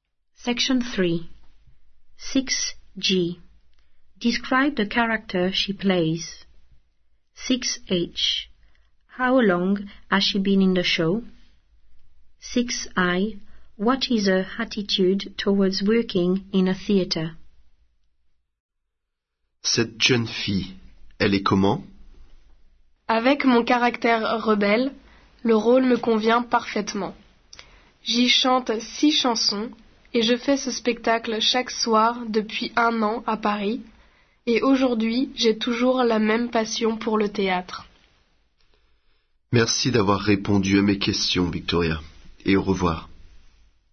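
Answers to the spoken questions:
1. Rebellious
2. 1 year
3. She still has the same passion for it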